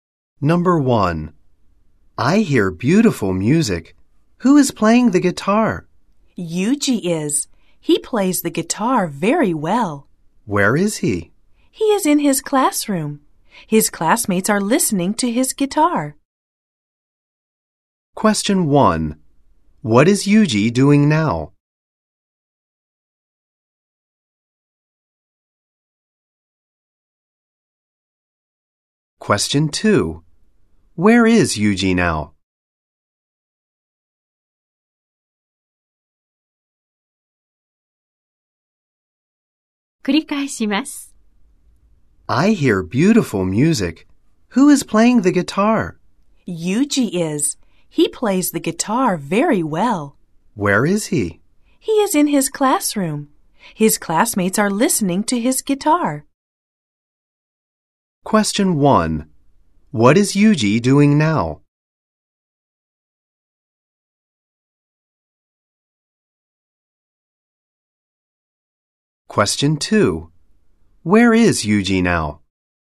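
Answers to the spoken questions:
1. ギターを弾いている
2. 教室にいる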